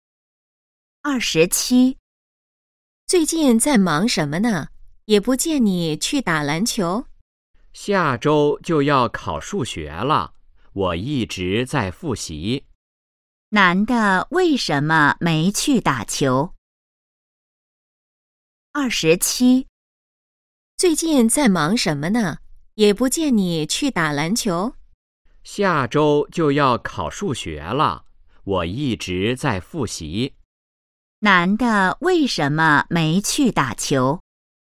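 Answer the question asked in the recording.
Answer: 下周要考数学,他一直在复习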